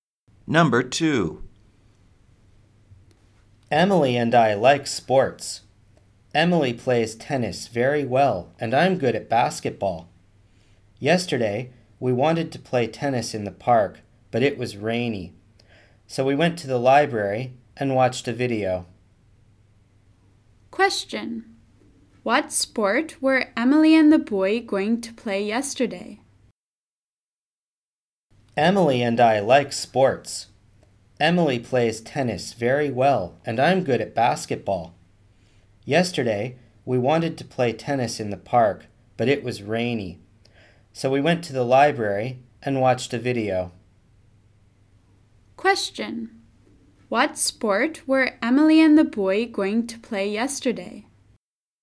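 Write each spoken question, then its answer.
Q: What sport were Emily and the boy going to play yesterday?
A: Tennis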